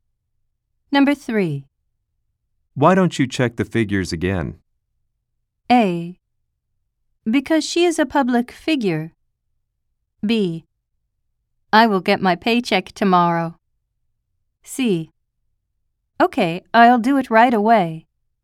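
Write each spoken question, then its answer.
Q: Why don't you check the figures again?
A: C: Okay, I'll do it right away.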